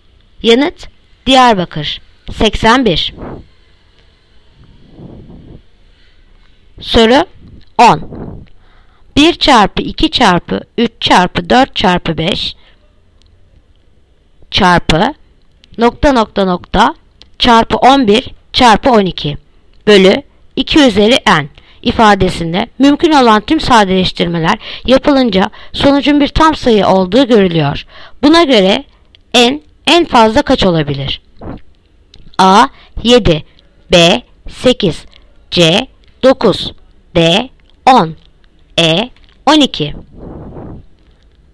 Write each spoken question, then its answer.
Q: Buna göre n en fazla kaç olabilir?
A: Yanıt Diyarbakır 10.